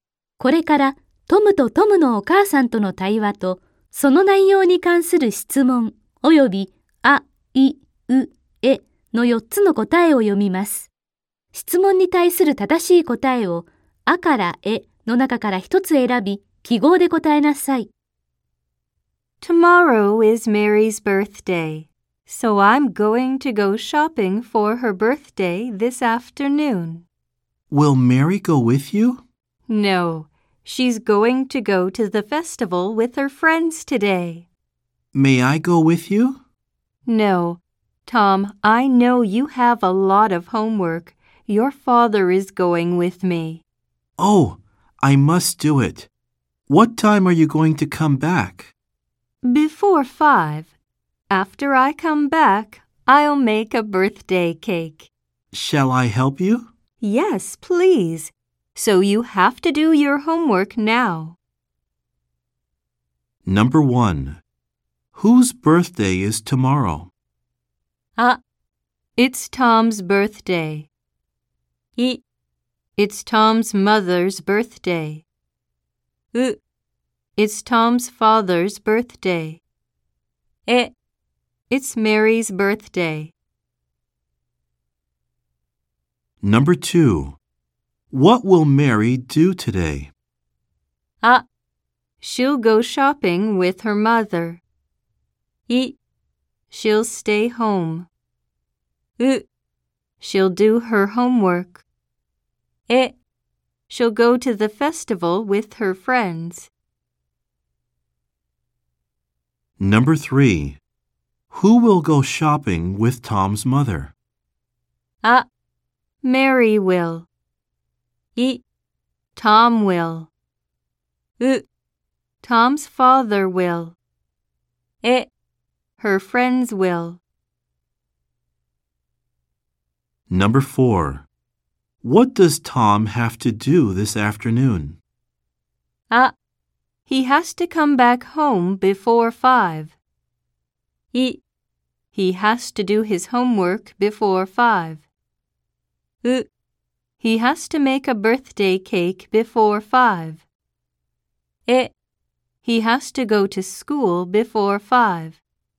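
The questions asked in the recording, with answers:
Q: Whose birthday is tomorrow?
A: え: It's Mary's birthday.

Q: What will Mary do today?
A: え: She'll go to the festival with her friends.

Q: Who will go shopping with Tom's mother?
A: う: Tom's father will.

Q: What does Tom have to do this afternoon?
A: い: He has to do his homework before 5.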